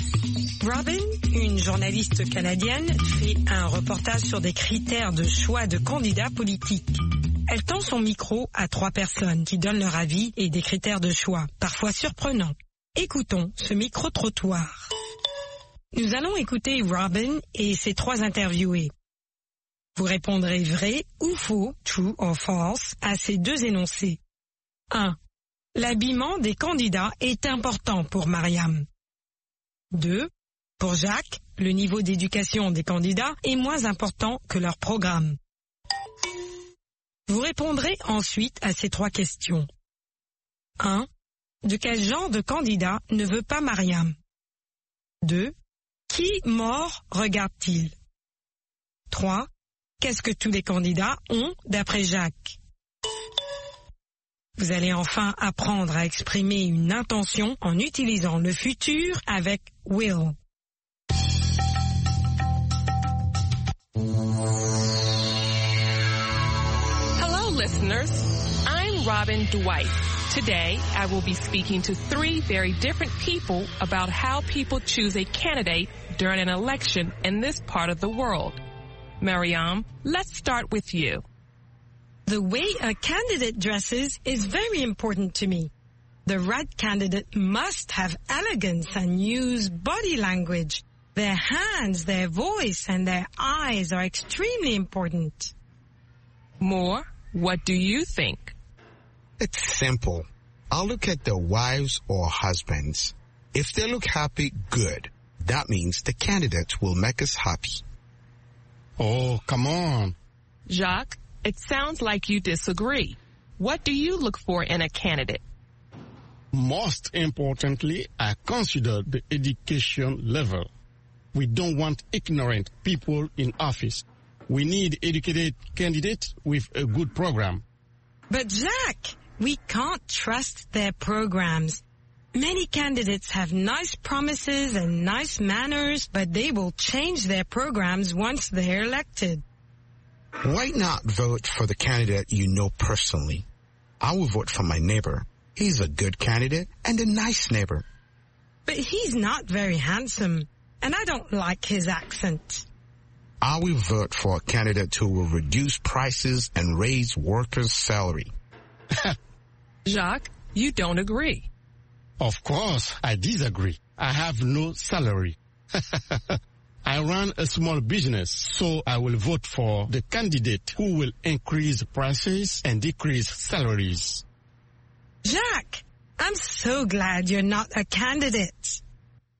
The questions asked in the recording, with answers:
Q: L'habillement des candidats est important pour Mariam.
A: L'énoncé 1 est vrai. L'habillement des candidats est important pour Mariam.

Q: Pour Jacques, le niveau d'éducation des candidats est moins important que leur programme.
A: L'énoncé 2 est faux.

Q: Qui mort regarde-t-il?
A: Les femmes des candidats et les maris des candidates.